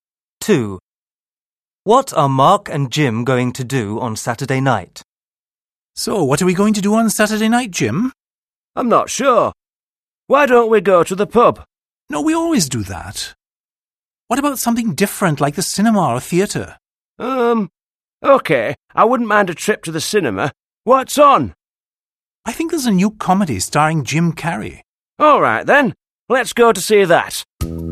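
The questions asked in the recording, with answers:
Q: What are Mark and Jim going to do on Saturday night?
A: Go to the cinema to see a comedy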